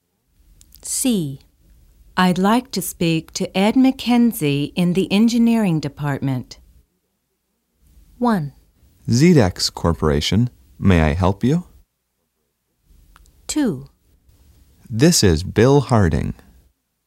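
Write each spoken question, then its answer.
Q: I'd like to speak to Ed McKenzie in the engineering department.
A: 1: ZDEX Corporation, may I help you?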